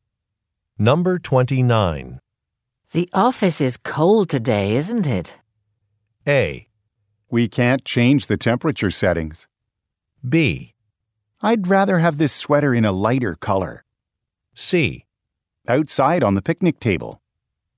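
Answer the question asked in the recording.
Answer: A: We can't change the temperature settings.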